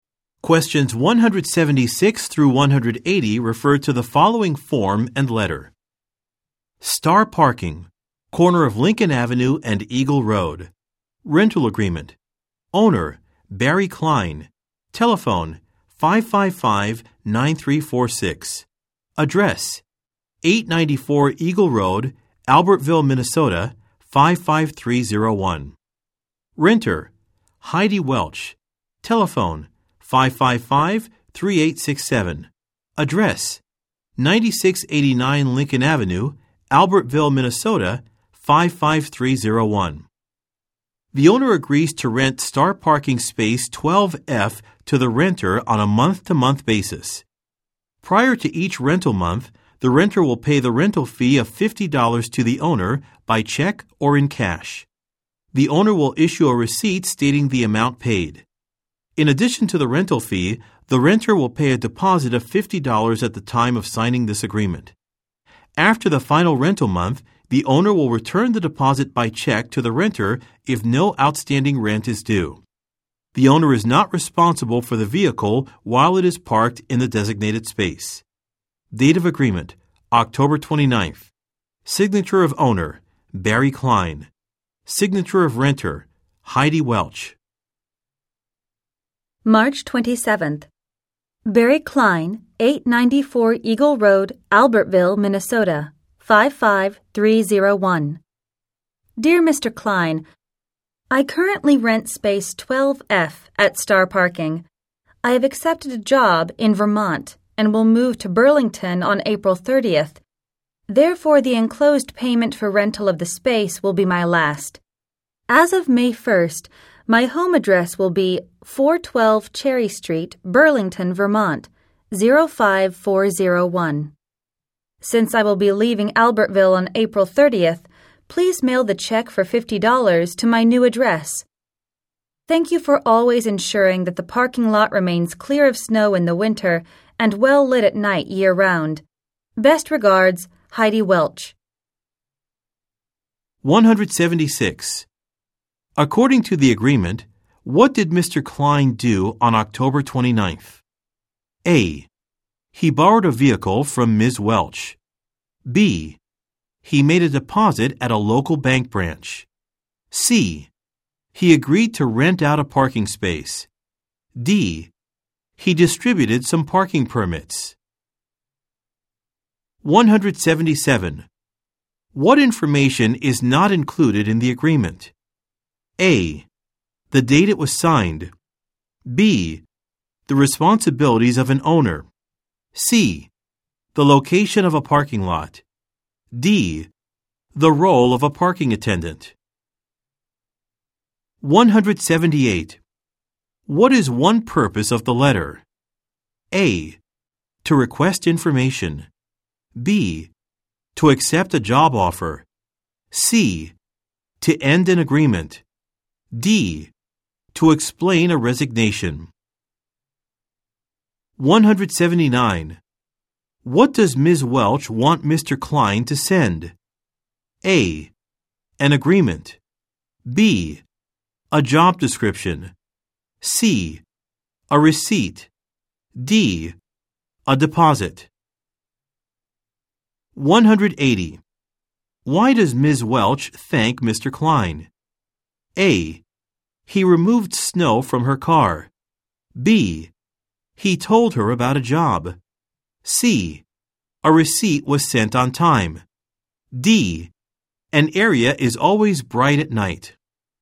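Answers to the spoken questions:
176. C: He agreed to rent out a parking space.
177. D: The role of a parking attendant.
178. C: To end an agreement.
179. D: A deposit.
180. D: An area is always bright at night.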